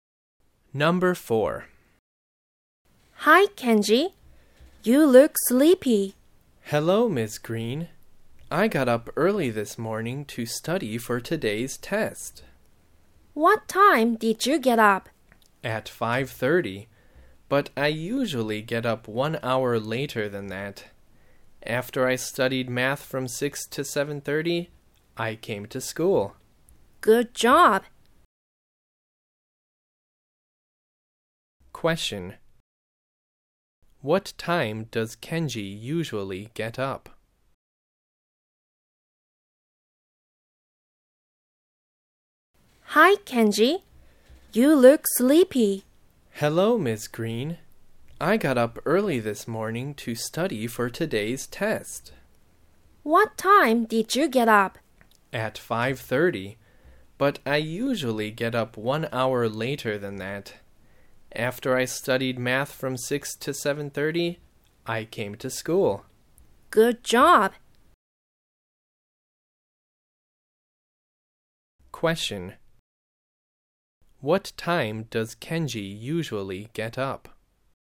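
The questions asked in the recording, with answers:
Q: What time does Kenji usually get up?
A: At 6:30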